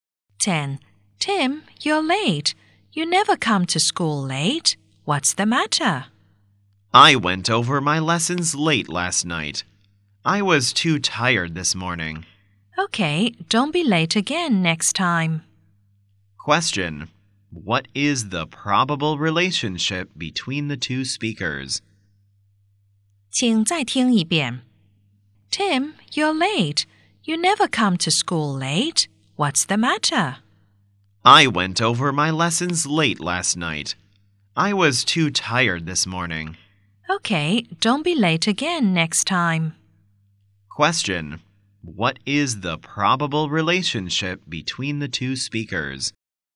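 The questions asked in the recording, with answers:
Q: What is the probable relationship between the two speakers?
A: Teacher and student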